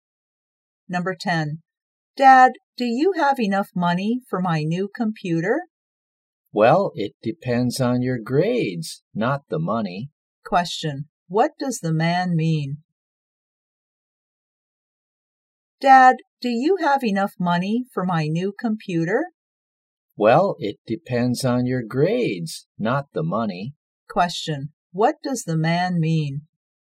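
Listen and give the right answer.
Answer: Whether he buys the computer depends on the child's grades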